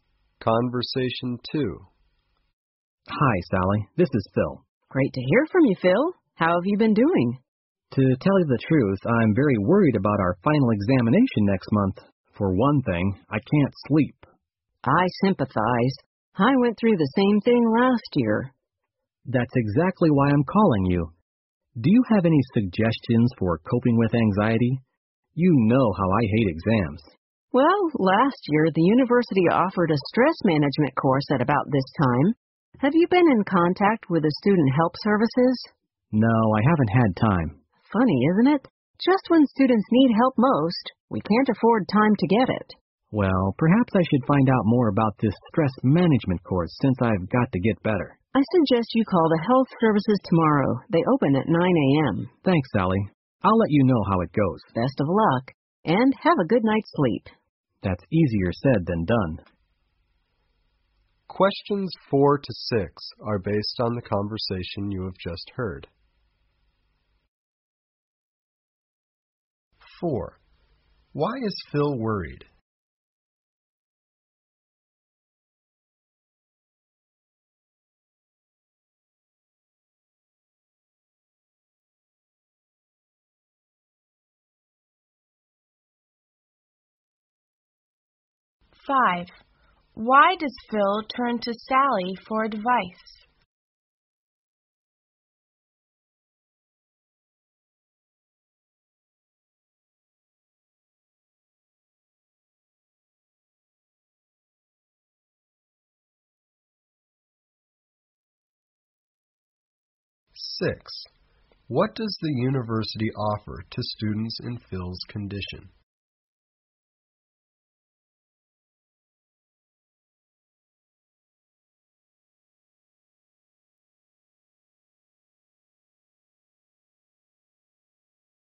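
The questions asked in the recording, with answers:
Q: Why is Phil worried?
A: He has his final examination next month

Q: Why does Phil turn to Sally for advice?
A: She went through the same thing last year

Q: What does the university offer to students in Phil's condition?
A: A stress management course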